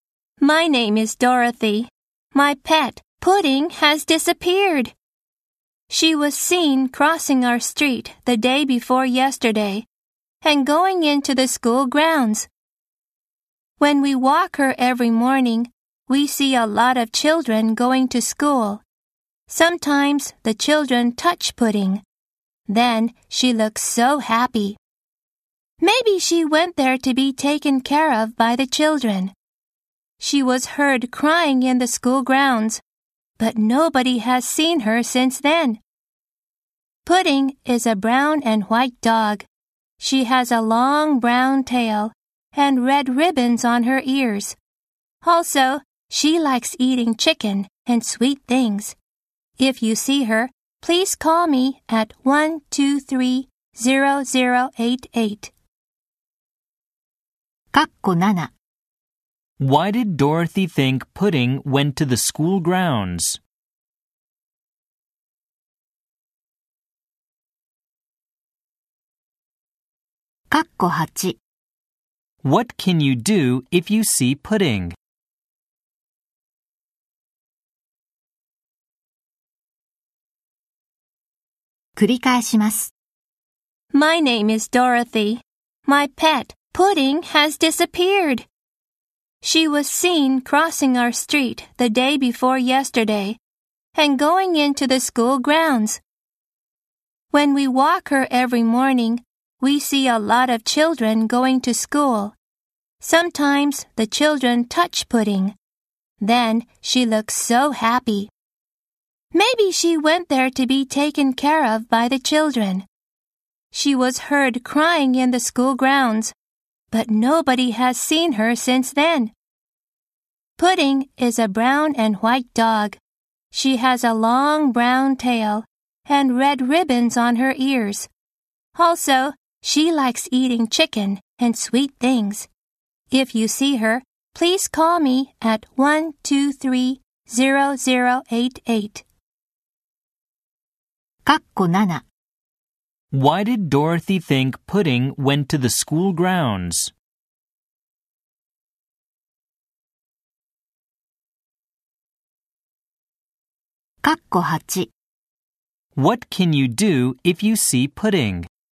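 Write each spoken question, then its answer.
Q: Why did Dorothy think Pudding went to the school grounds?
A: To be taken care of by the children, who touch her and make her happy.

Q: What can you do if you see Pudding?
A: Call Dorothy at 123-0088.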